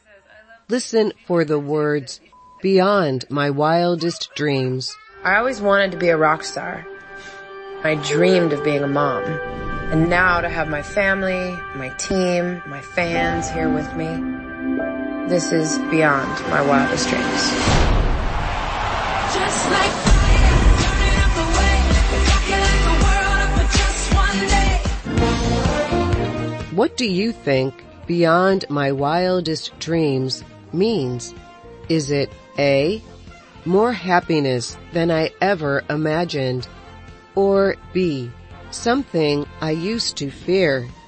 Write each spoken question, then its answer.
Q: what do you think beyond my wildest dreams means?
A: The answer is A, more happiness than I ever imagined.